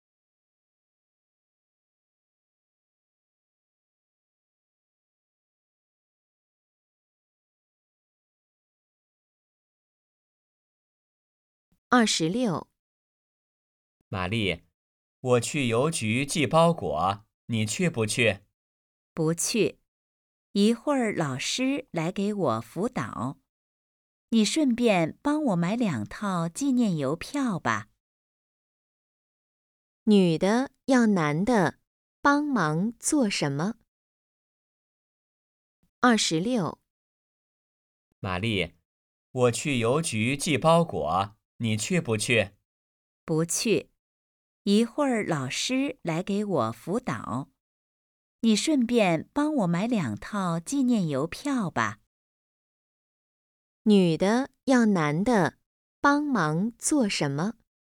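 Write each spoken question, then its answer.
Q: 女的要男的帮忙做什么?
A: 买两套纪念邮票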